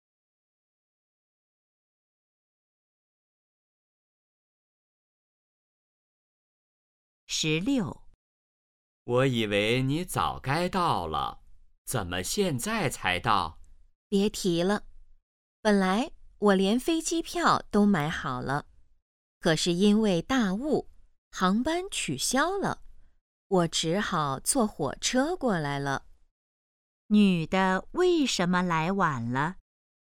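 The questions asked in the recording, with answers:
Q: 女的为什么来晚了?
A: 因为大雾航班取消,只好坐火车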